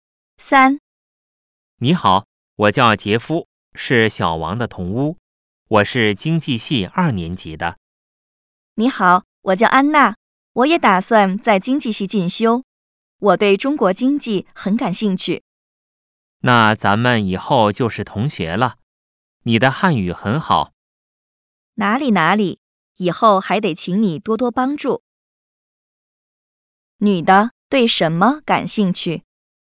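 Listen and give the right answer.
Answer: 中国经济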